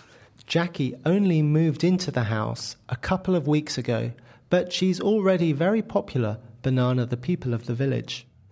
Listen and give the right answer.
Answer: Among. Very good.